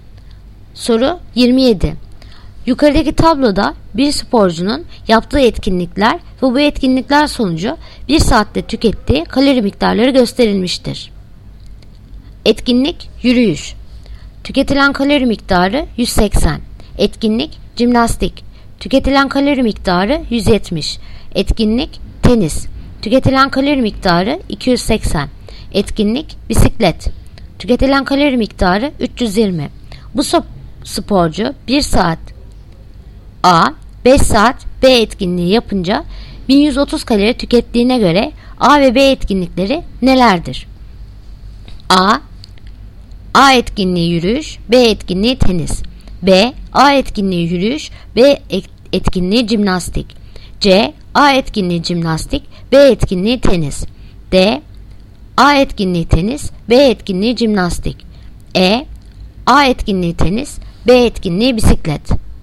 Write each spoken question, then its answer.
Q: A ve B etkinlikleri nelerdir?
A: Yanıt: Diyarbakır. A etkinliği tenis, B etkinliği jimnastik.